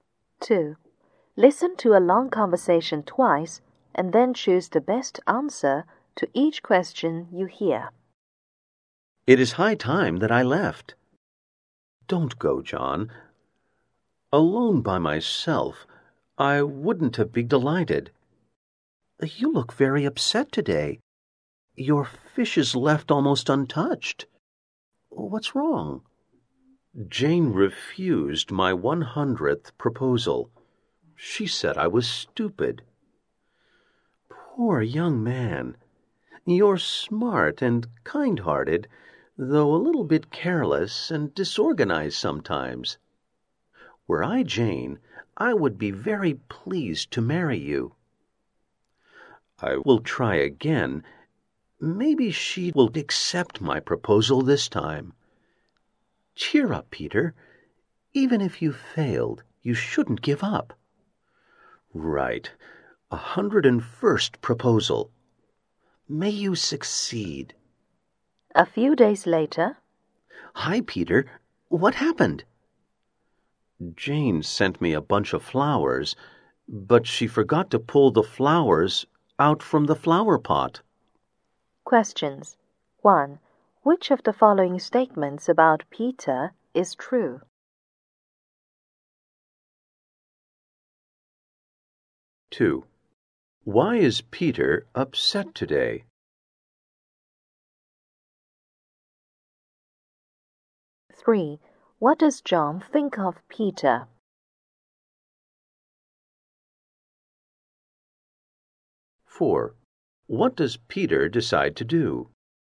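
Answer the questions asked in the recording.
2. Jane refused his 100th proposal.
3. He is smart and kind-hearted, though a little careless and disorganized.
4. Propose to Jane again.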